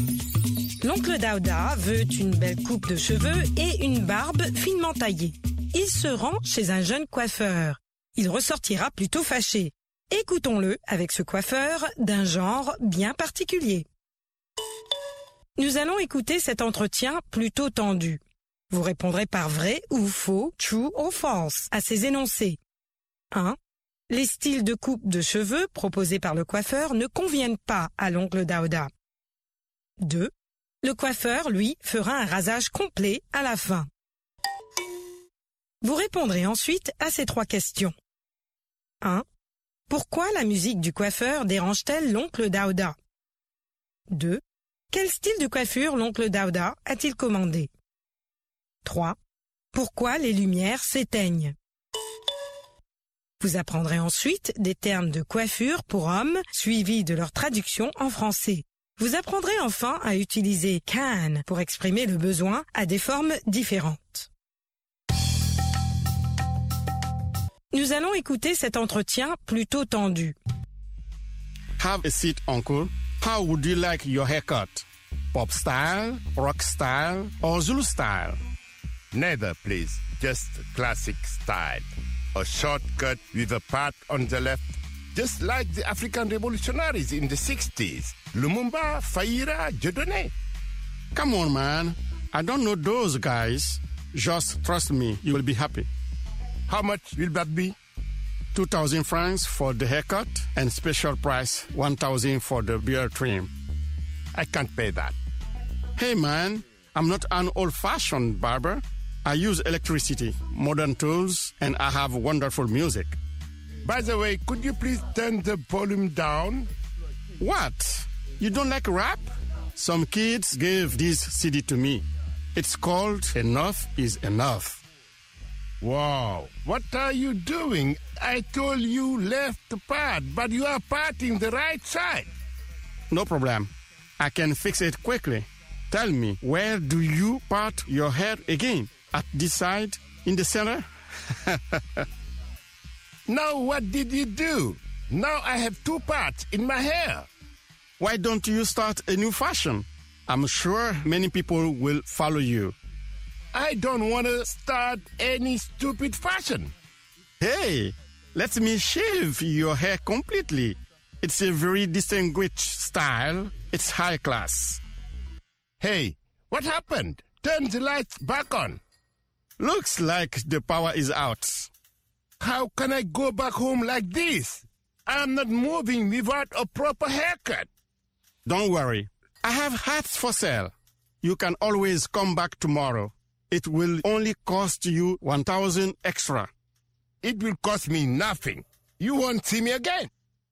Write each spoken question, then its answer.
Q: Les styles de coupe de cheveux proposés par le coiffeur ne conviennent pas à l'oncle Daouda.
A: L'énoncé 1 est vrai.

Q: Le coiffeur, lui, fera un rasage complet à la fin.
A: L'énoncé 2 est faux.

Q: Pourquoi la musique du coiffeur dérange-t-elle l'oncle Daouda?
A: Le volume est trop fort.

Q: Quel style de coiffure l'oncle Daouda a-t-il commandé?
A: Une coupe courte avec une raie sur le côté gauche.